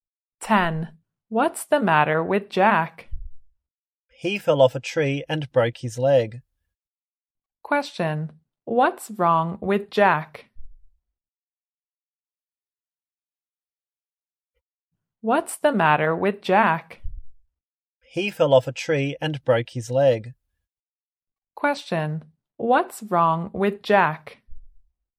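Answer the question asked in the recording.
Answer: He broke his leg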